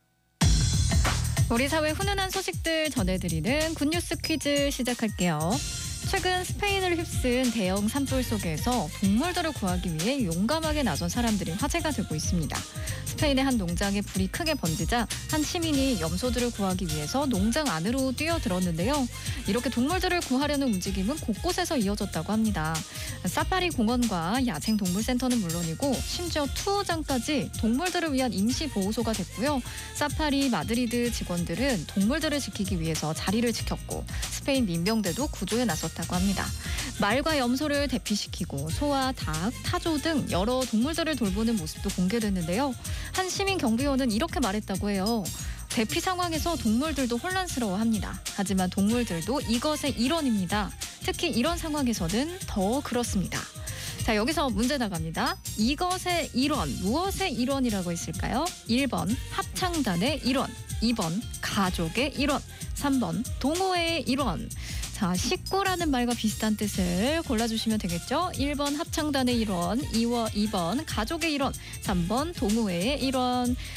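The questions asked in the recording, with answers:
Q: 이것의 일원, 무엇의 일원이라고 있을까요?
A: 2: 가족의 일원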